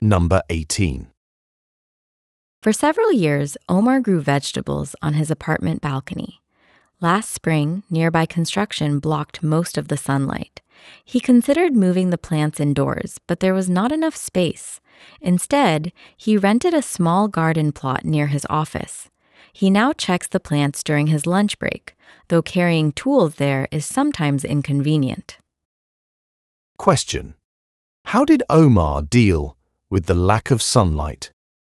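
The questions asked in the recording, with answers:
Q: How did Omar deal with the lack of sunlight?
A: He rented a small garden plot near his office.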